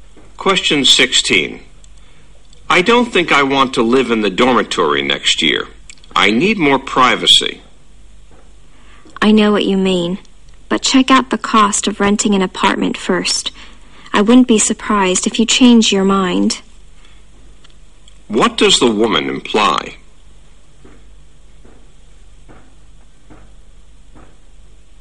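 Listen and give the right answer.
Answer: Renting an apartment costs so much that the man may change his mind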